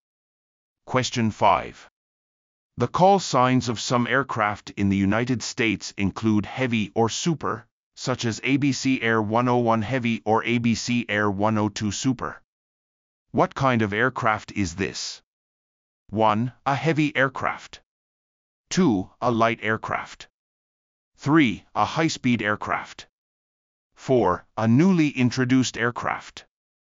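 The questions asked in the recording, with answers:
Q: What kind of aircraft is this?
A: 1: A heavy aircraft.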